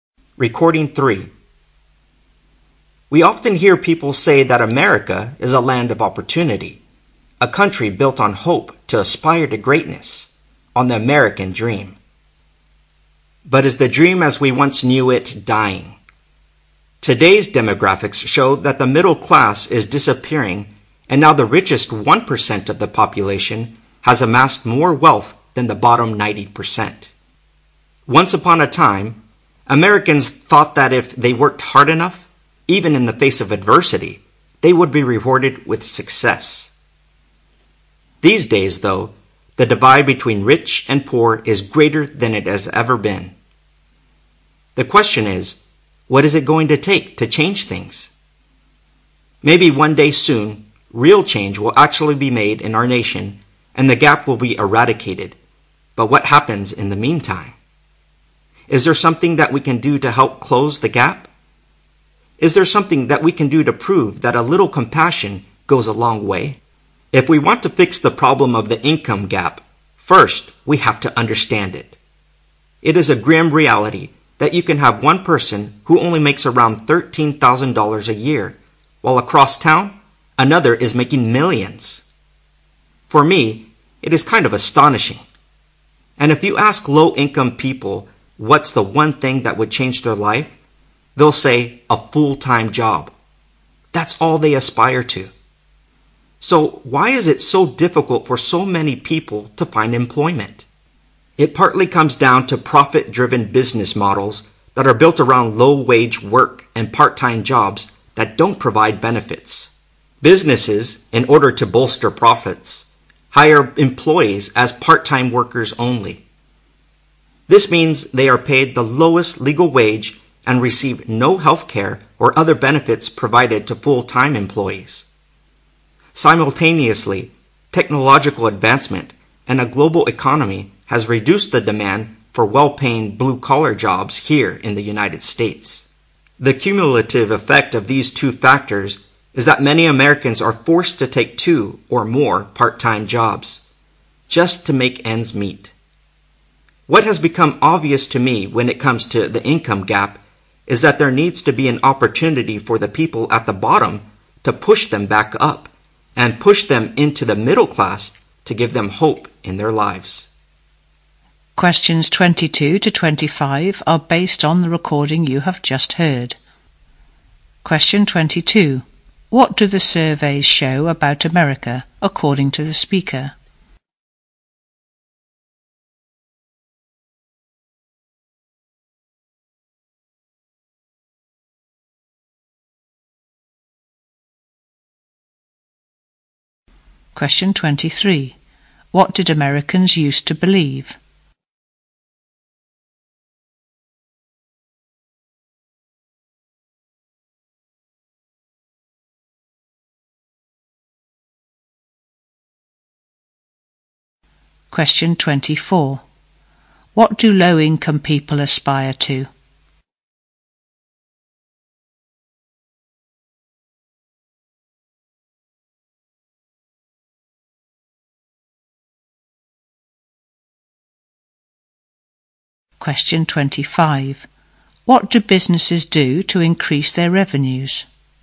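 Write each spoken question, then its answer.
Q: What do the surveys show about America, according to the speaker?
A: The middle class is disappearing; the richest 1% have more wealth than the bottom 90%

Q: What did Americans used to believe?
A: Hard work would be rewarded with success

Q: What do low-income people aspire to?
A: A full-time job

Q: What do businesses do to increase their revenues?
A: Hire employees as part-time workers only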